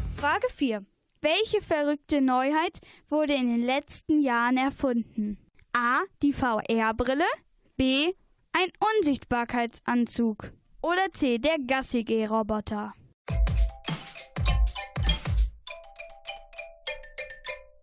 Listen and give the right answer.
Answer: Richtig ist die VR-Brille.